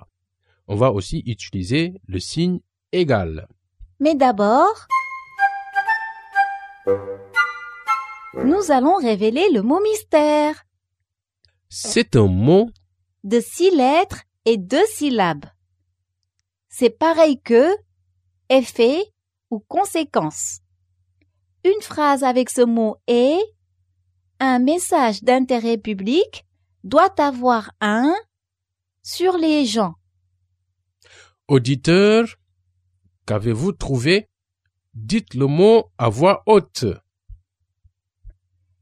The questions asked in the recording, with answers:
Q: Auditeur, qu'avez-vous trouvé?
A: Le mot mystère est impact.